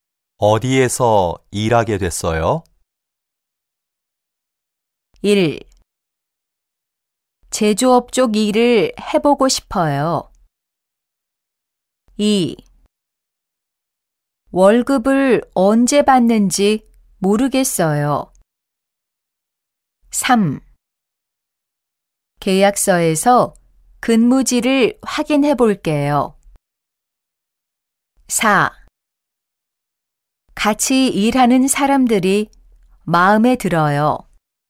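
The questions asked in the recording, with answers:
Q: 어디에서 일하게 됐어요?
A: 3: 계약서에서 근무지를 확인해 볼게요.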